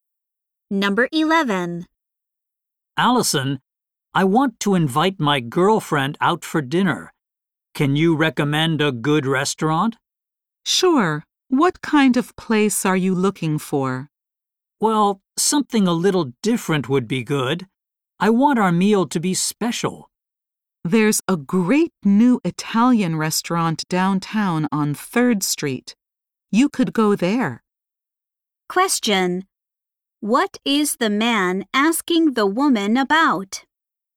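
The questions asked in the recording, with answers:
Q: What is the man asking the woman about?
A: A good restaurant to take his girlfriend to for dinner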